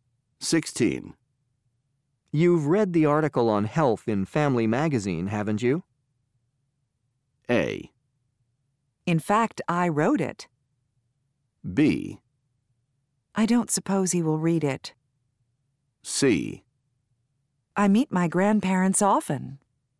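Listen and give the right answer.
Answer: A: In fact, I wrote it.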